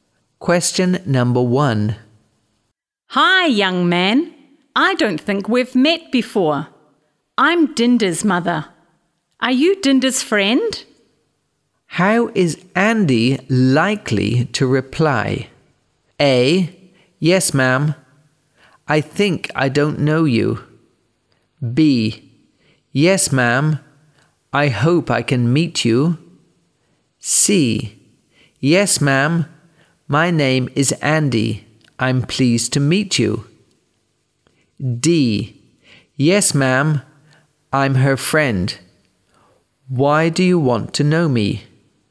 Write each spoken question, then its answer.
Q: How is Andy likely to reply?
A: C. Yes, ma'am. My name is Andy.